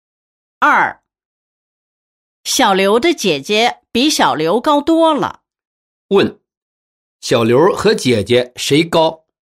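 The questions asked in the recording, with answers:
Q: 问,小刘和姐姐谁高?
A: 姐姐高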